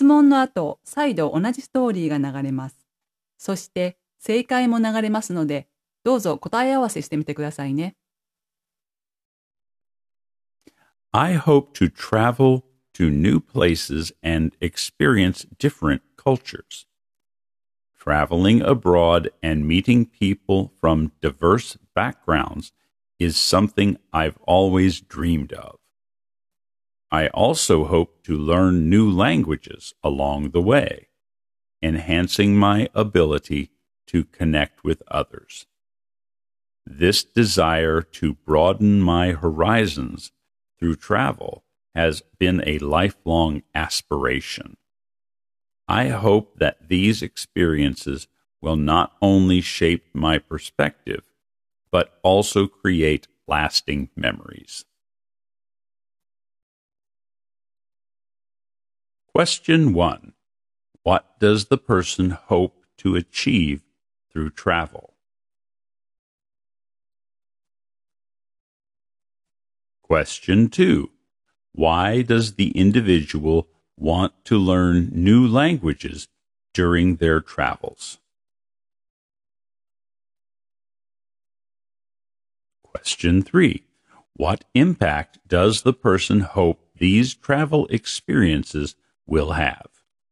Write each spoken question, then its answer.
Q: What does the person hope to achieve through travel?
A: to experience different cultures.

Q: Why does the individual want to learn new languages during their travels?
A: To enhance their ability to connect with others.

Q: What impact does the person hope these travel experiences will have?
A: to shape their perspective and create lasting memories.